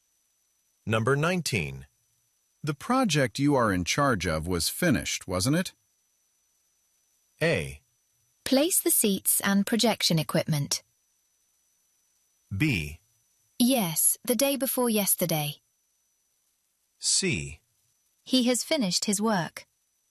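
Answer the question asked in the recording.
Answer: B: Yes, the day before yesterday.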